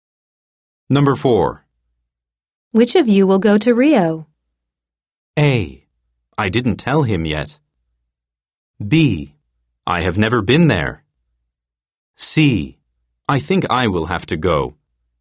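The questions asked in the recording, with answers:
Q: Which of you will go to Rio?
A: C: I think I will have to go.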